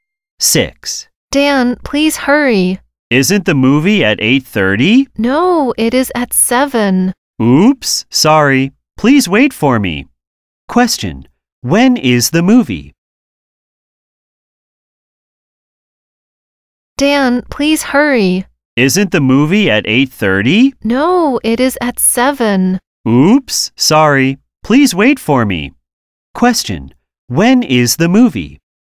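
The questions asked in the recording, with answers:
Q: when is the movie?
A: At 7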